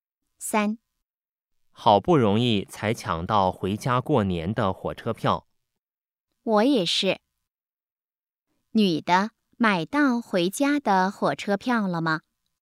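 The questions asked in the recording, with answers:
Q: 女的买到回家的火车票了吗?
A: 买到了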